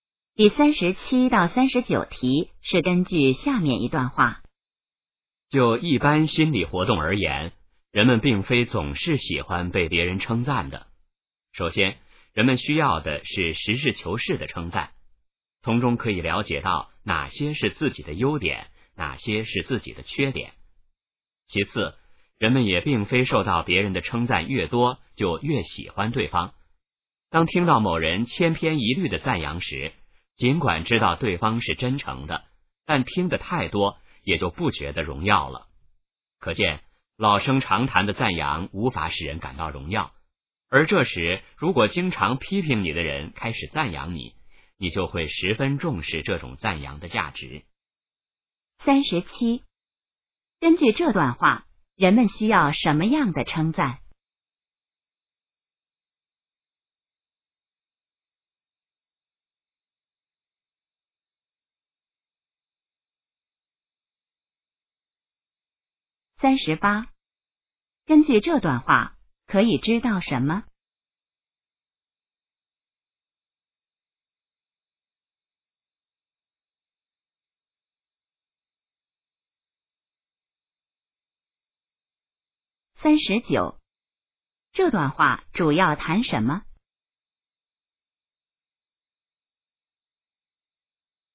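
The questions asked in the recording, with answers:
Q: 根据这段话,人们需要什么样的称赞?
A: 实事求是的称赞

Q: 这段话主要谈什么?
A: 人们对称赞的心理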